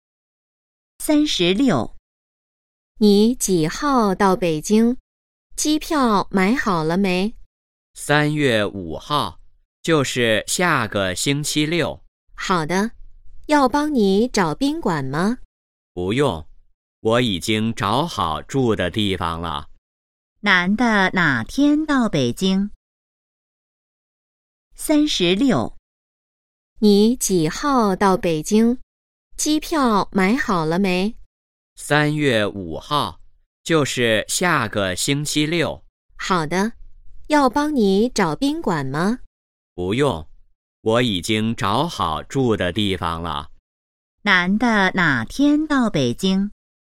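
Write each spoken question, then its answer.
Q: 男的哪天到北京?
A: 3月5号(下个星期六)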